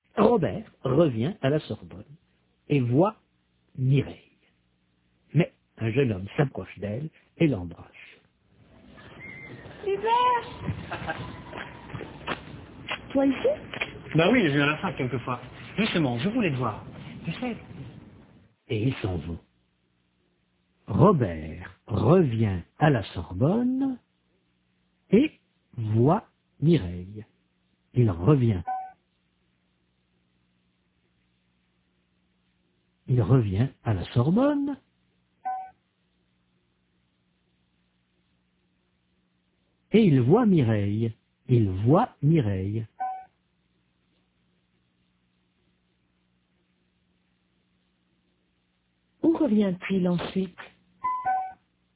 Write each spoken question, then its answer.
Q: Où revient-il ensuite ?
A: À la Sorbonne.